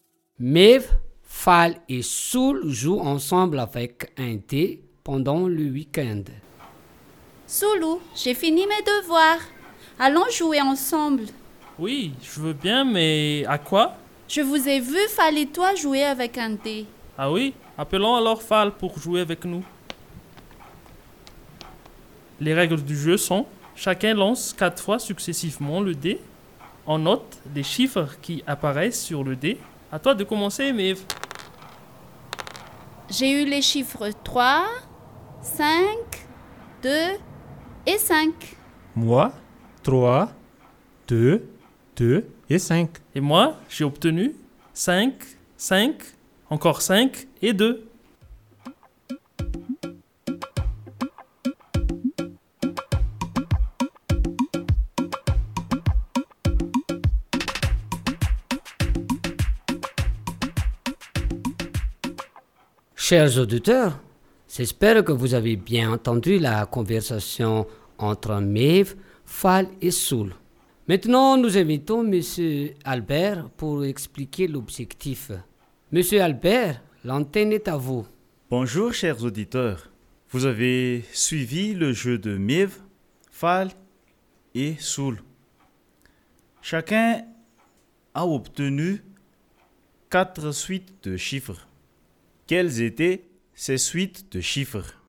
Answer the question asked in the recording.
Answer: Maeve a eu les chiffres 3, 5, 2 et 5. Pour Fall, 3, 2, 2 et 5. Et pour Soul, 5, 5, 5 et 2.